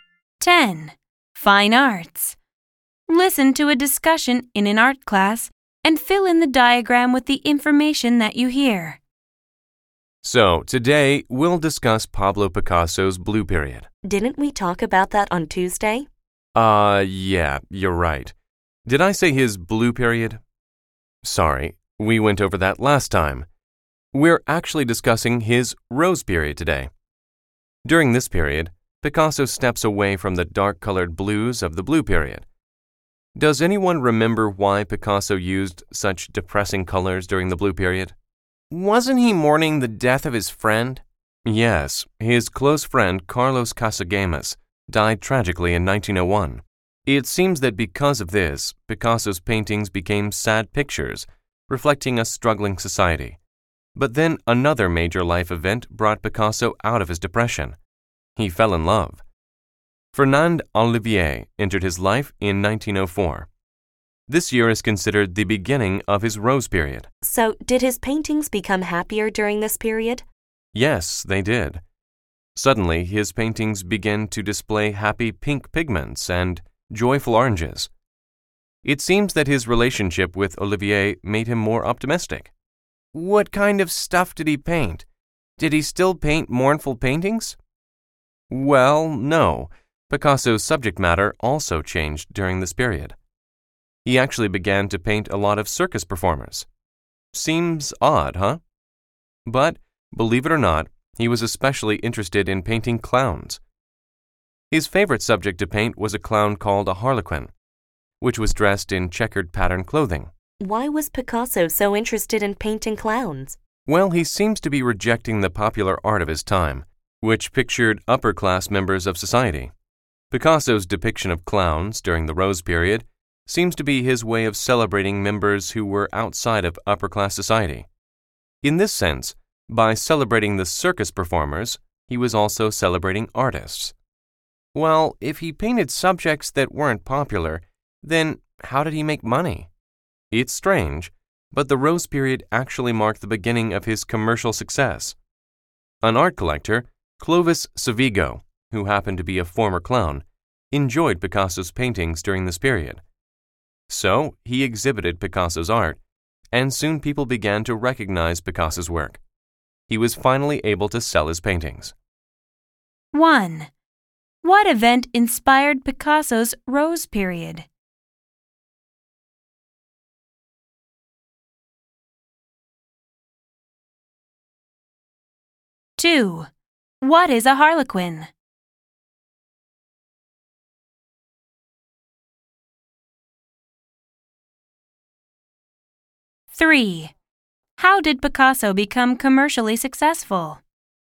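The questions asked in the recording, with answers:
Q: What event inspired Picasso's Rose Period?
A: He fell in love with Fernande Olivier in 1904.

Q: What is a harlequin?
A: A clown dressed in checkered pattern clothing.

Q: How did Picasso become commercially successful?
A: An art collector, a former clown, exhibited his paintings, so people began to recognize his work.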